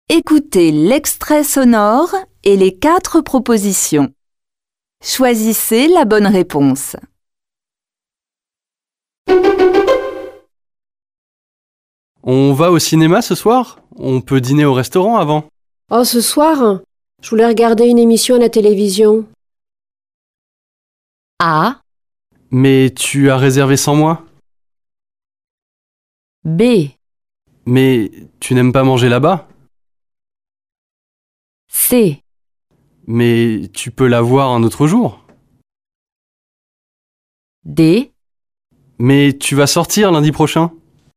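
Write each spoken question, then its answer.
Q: Choisissez la bonne réponse.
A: C: Mais tu peux la voir un autre jour?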